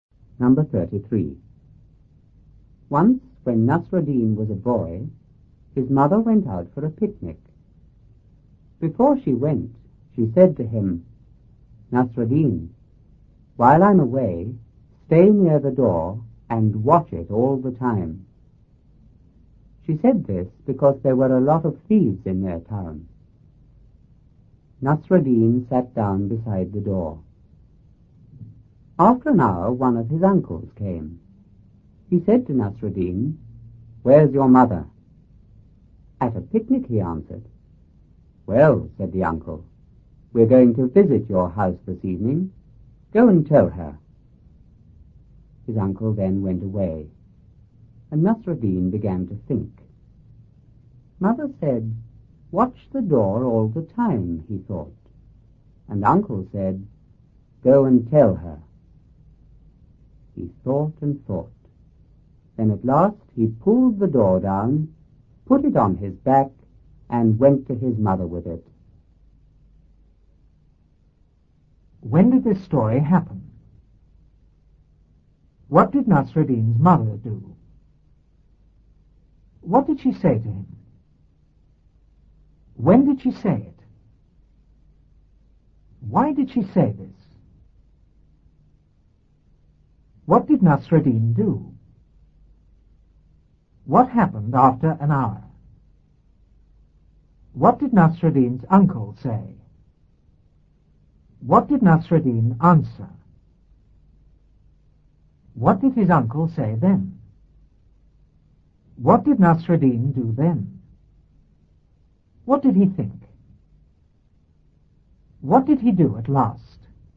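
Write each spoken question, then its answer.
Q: When did this story happen?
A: When Nasruddin was a boy

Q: What did Nasruddin's mother do?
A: She went out for a picnic

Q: What did she say to him?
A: Stay near the door and watch it all the time

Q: When did she say it?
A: Before she went

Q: Why did she say this?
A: Because there were a lot of thieves in their town

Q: What did Nasruddin do?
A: He sat down beside the door

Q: What happened after an hour?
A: One of his uncles came

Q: What did Nasruddin's uncle say?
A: Where's your mother?

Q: What did Nasruddin answer?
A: At a picnic

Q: What did his uncle say then?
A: We're going to visit your house this evening. Go and tell her.

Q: What did Nasruddin do then?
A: He began to think

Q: What did he think?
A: Mother said watch the door all the time, and uncle said go and tell her

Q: What did he do at last?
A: He pulled the door down, put it on his back and took it to his mother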